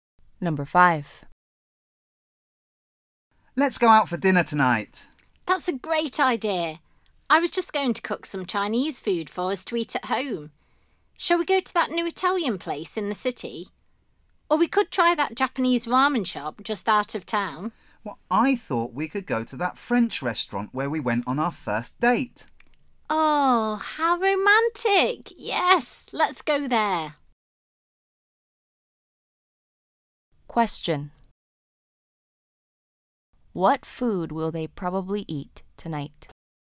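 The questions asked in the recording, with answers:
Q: What food will they probably eat tonight?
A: French food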